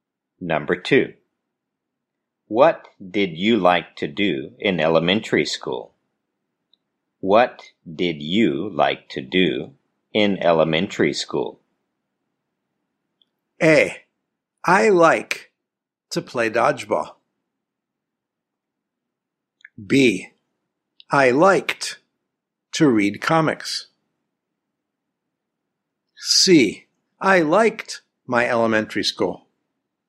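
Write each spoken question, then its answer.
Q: What did you like to do in elementary school?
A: B: I liked to read comics.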